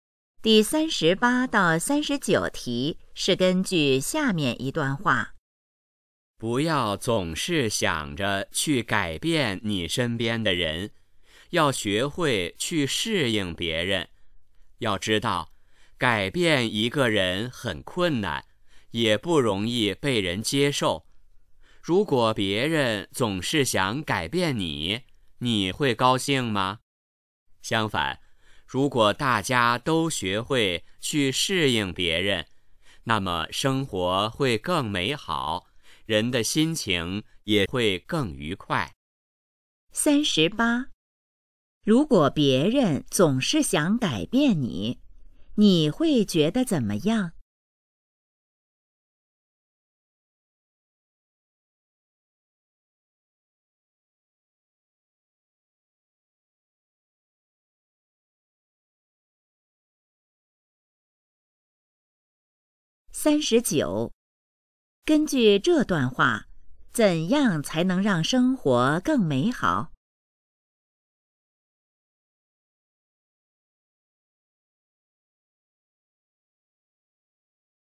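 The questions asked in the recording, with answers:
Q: 如果别人总是想改变你,你会觉得怎么样?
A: 不高兴

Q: 根据这段话,怎样才能让生活更美好?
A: 学会适应别人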